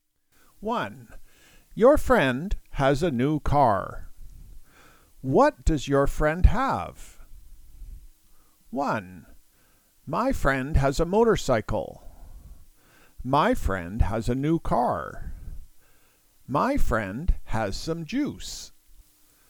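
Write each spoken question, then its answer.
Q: What does your friend have?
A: 2: My friend has a new car.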